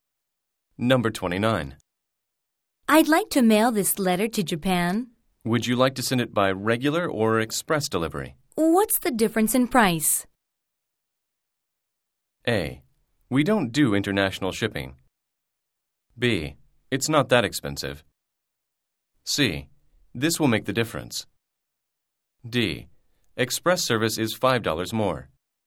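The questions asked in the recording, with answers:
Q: What's the difference in price?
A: D: Express service is $5 more.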